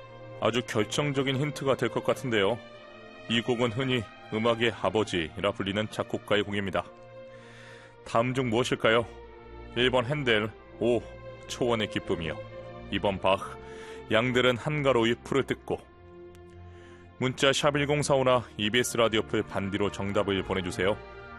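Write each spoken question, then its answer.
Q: 다음 중 무엇일까요? 1번 헨델, 오, 초원의 기쁨이요. 2번 바흐, 양들은 한가로이 풀을 뜯고.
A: 2: 바흐, 양들은 한가로이 풀을 뜯고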